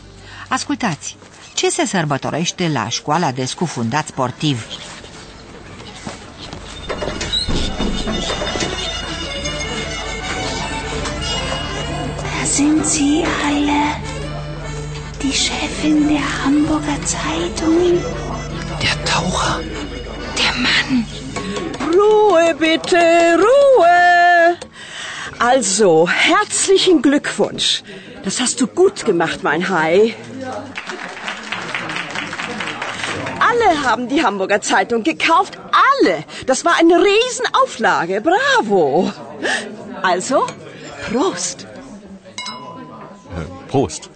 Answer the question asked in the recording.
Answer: Da, stimați ascultători, se sărbătorește reușita înșelăciunii.